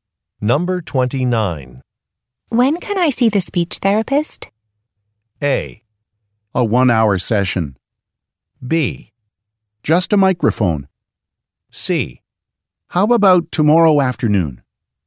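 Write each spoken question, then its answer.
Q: When can I see the speech therapist?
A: C: How about tomorrow afternoon?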